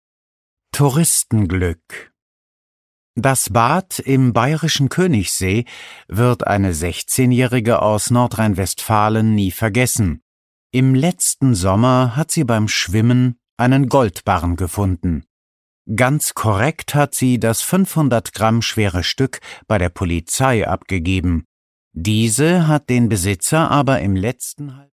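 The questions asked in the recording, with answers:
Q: Wie schwer war der Goldbarren?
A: 500 Gramm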